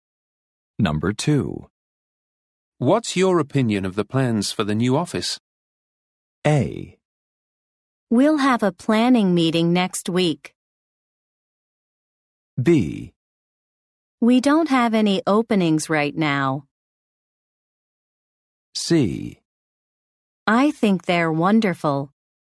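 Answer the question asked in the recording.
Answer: C: I think they're wonderful.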